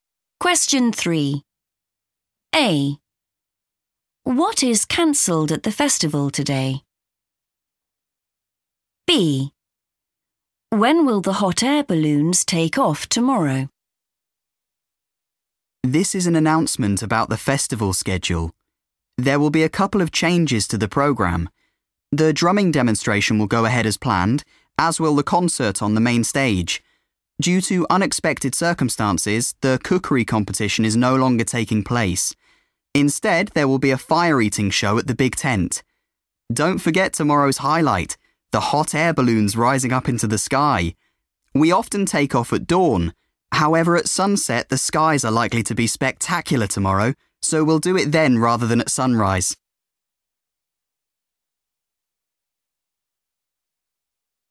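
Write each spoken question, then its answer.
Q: What is cancelled at the festival today?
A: the cookery competition

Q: When will the hot air balloons take off tomorrow?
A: at sunset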